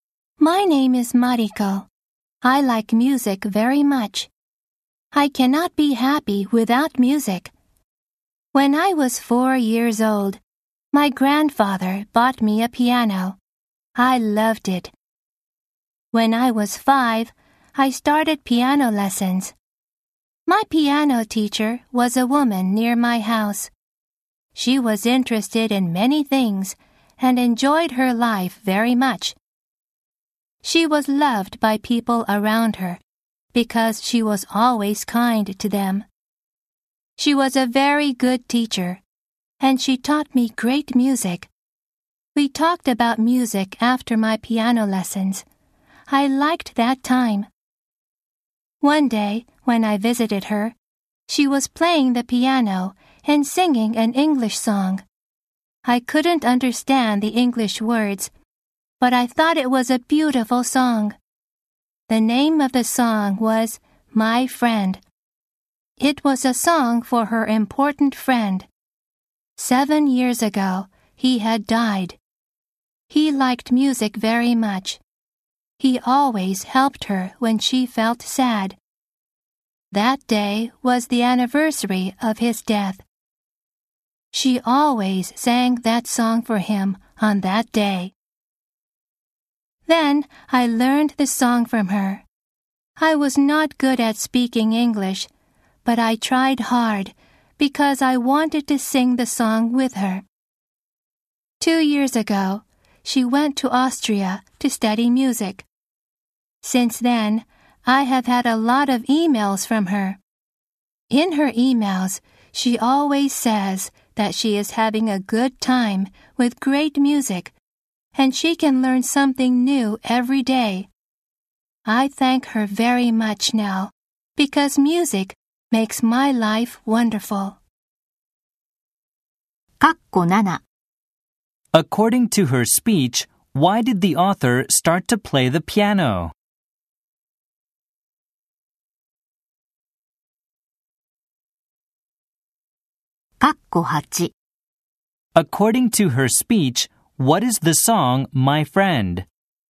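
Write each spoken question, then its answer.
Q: According to her speech, why did the author start to play the piano?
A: Because her grandfather bought her a piano when she was 4.

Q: According to her speech, what is the song, My Friend?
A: A song her piano teacher sang for an important friend who had died.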